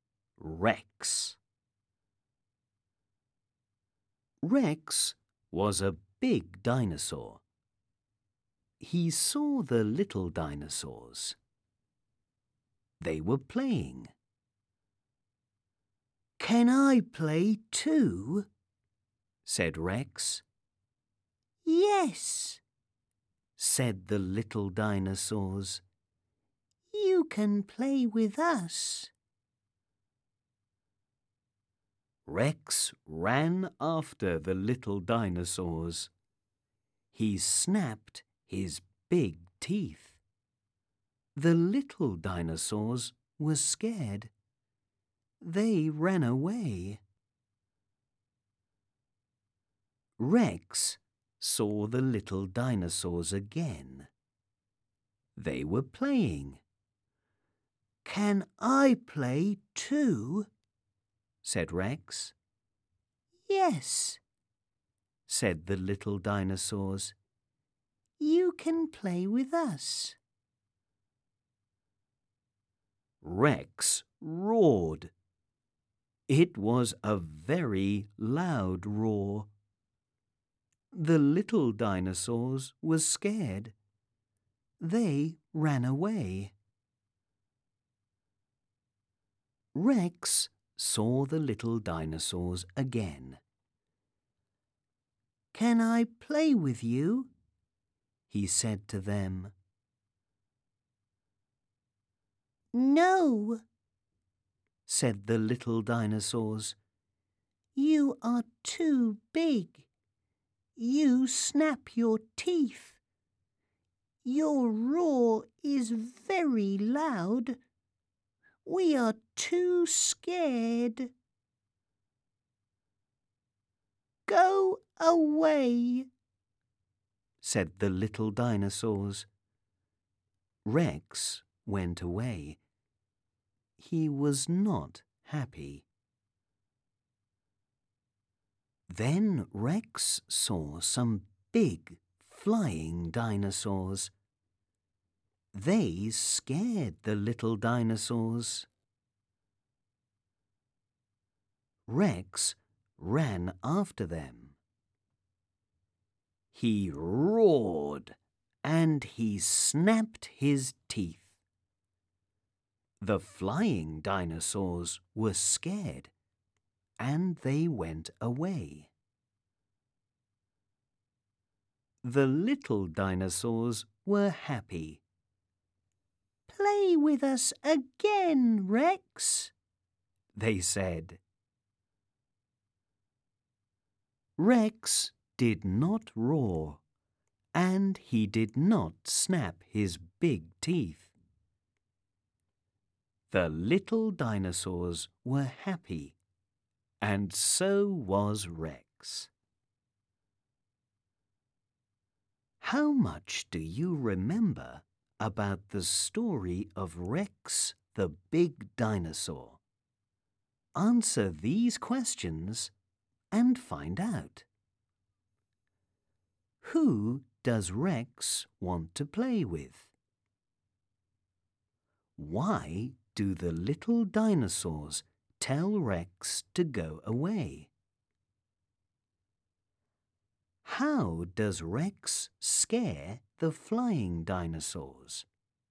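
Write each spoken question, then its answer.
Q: Who does Rex want to play with?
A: The little dinosaurs

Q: Why do the little dinosaurs tell Rex to go away?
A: He is too big, snaps his teeth and roars loudly, so they are scared

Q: How does Rex scare the flying dinosaurs?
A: He runs after them, roars and snaps his teeth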